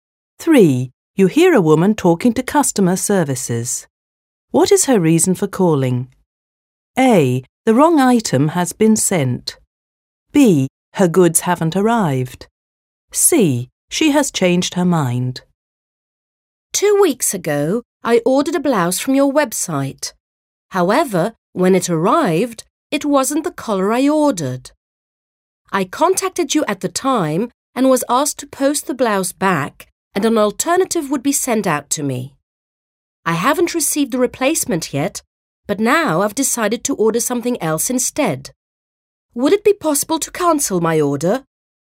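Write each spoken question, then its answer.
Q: What is her reason for calling?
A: C: She has changed her mind.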